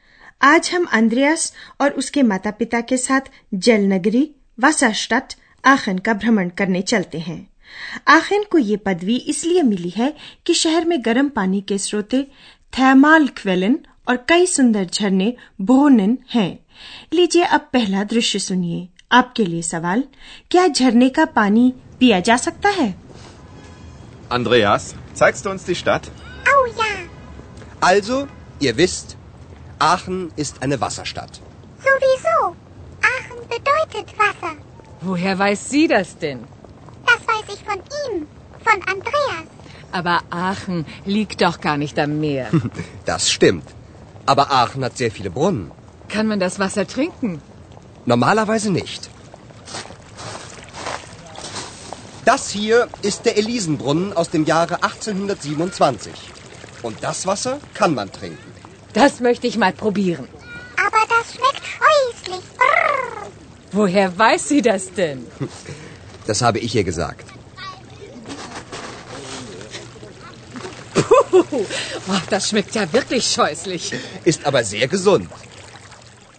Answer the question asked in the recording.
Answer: यूं तो झरने का पानी नहीं पिया जा सकता है लेकिन एक खास झरने Alison ब्रोनन का पानी पिया जा सकता है